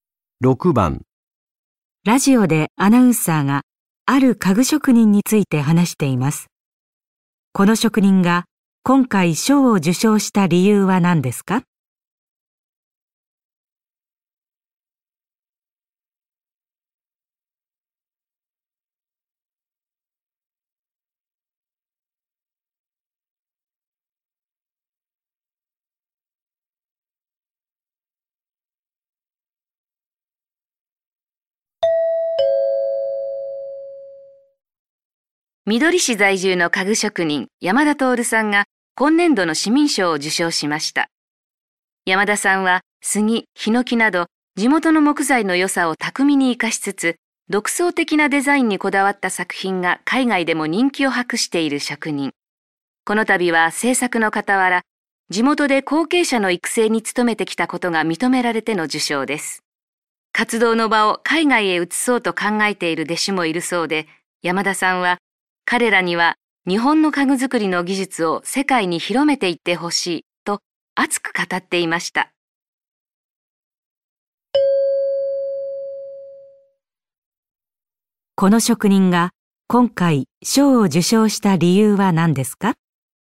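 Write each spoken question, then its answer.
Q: この職人が今回賞を受賞した理由は何ですか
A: 地元で後継者の育成に努めてきたこと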